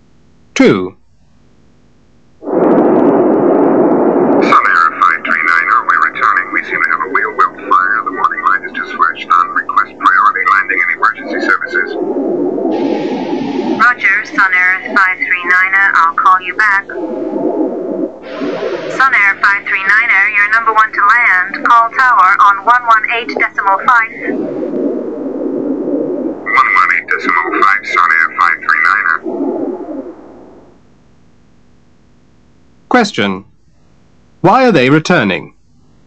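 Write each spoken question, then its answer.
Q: Why are they returning?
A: Wheel well fire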